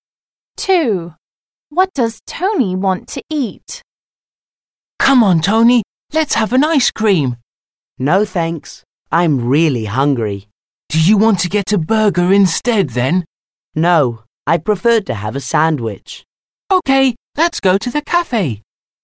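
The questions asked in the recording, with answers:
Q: What does Tony want to eat?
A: a sandwich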